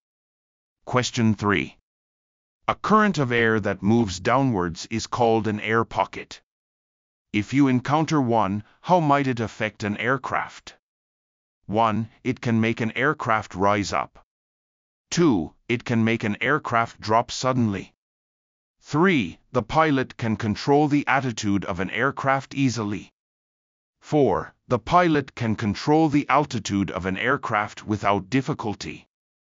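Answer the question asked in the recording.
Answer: 2: It can make an aircraft drop suddenly.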